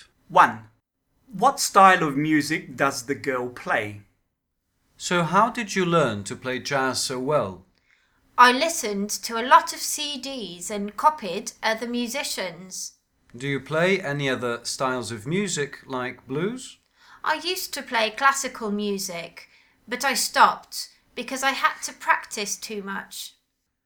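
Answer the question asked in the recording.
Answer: jazz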